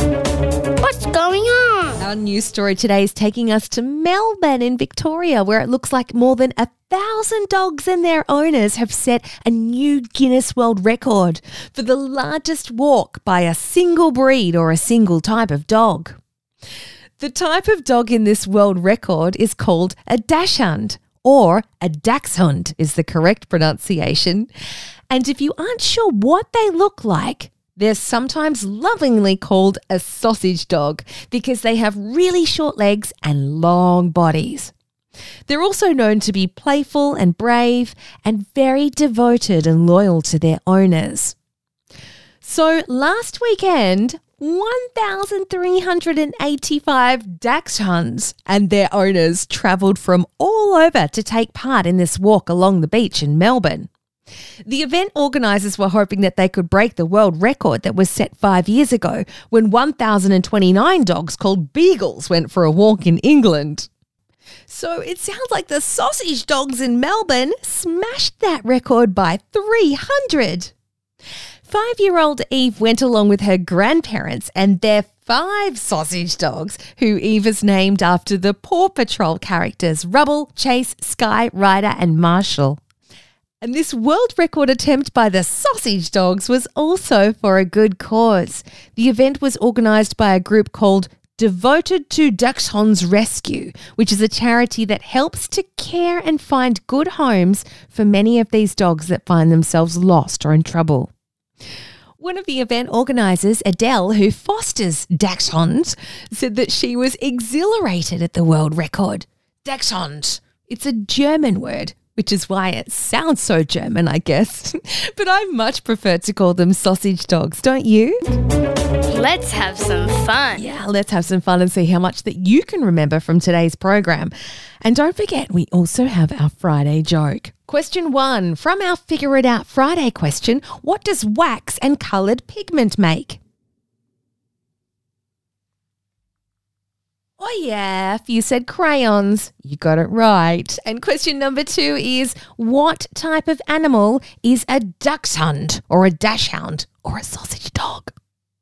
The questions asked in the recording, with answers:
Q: what type of animal is a dachshund or a dachshund or a sausage dog?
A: Of course, it's a dog.